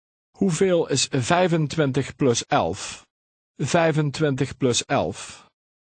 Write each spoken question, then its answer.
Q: Hoeveel is 25 plus 11? 25 plus 11.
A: 36.